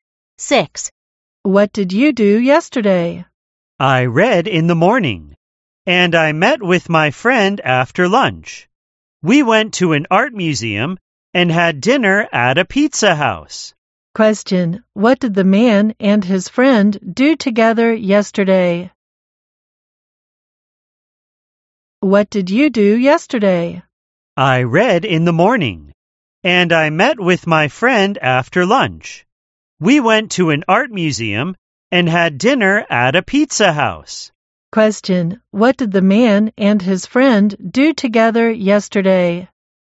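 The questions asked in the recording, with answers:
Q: Question: what did the man and his friend do together yesterday?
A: Went to an art museum and had dinner at a pizza house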